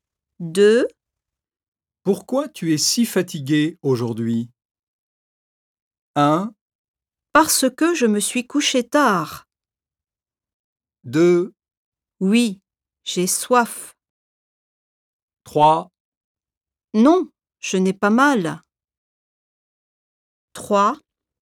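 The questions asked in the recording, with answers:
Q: Pourquoi tu es si fatiguée aujourd'hui?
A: 1: Parce que je me suis couchée tard.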